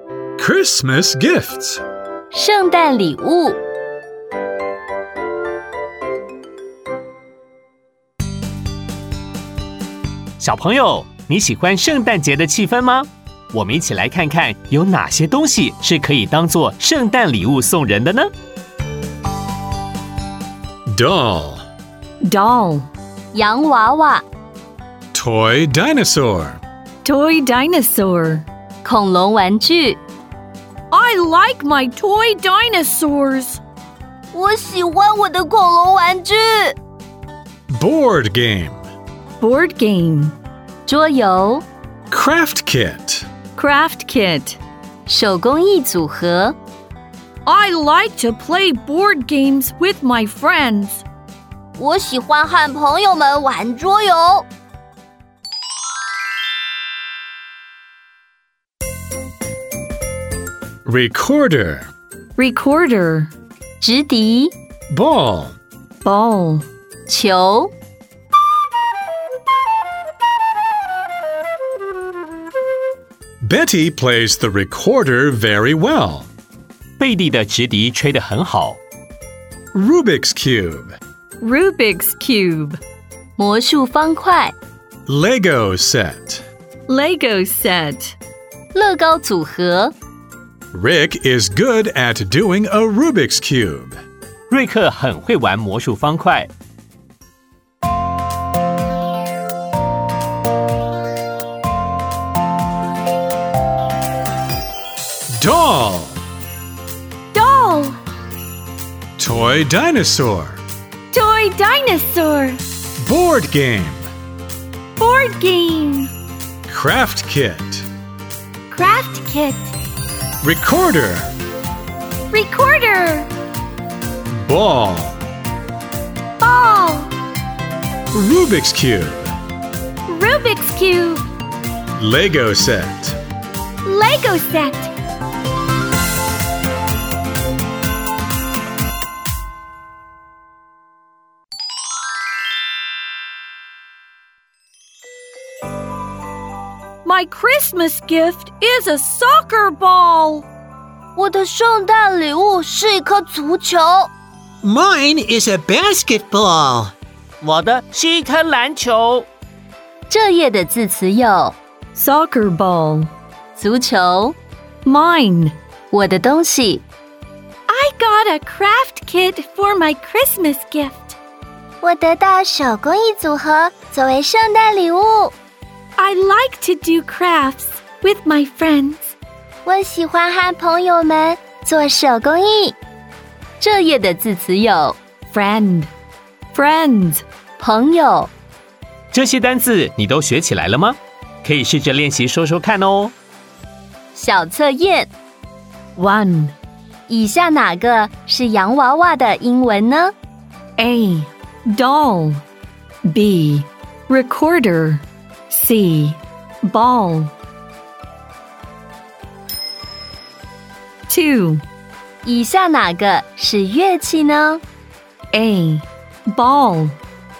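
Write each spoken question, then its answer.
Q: 以下哪个是洋娃娃的英文呢?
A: A: Doll

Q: 以下哪个是乐器呢?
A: C: Recorder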